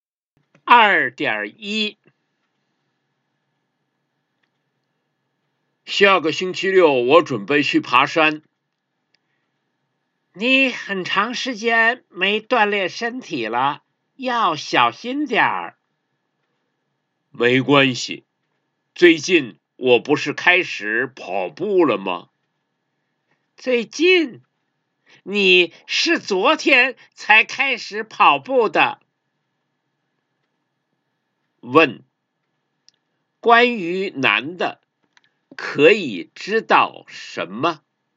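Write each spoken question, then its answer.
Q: 问,关于男的,可以知道什么?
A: 他很长时间没锻炼身体了,昨天才开始跑步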